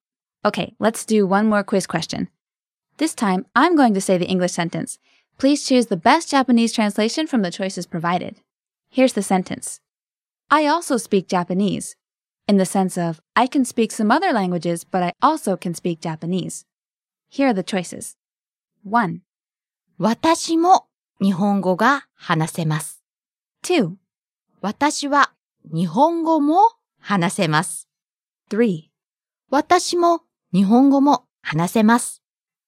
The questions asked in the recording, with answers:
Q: Here's the sentence. I also speak Japanese.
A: 2. 私は日本語も話せます。